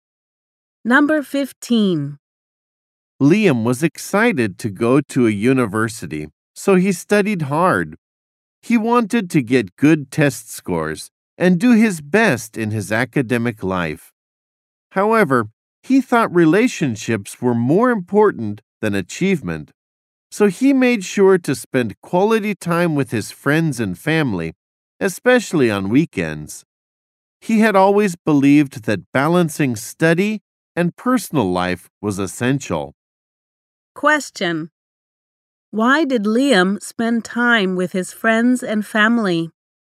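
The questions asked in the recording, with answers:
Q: Question: Why did Liam spend time with his friends and family?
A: He thought relationships were more important than achievement.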